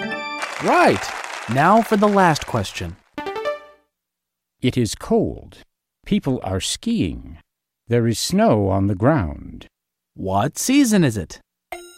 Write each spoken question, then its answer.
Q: What season is it?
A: Winter. It's winter.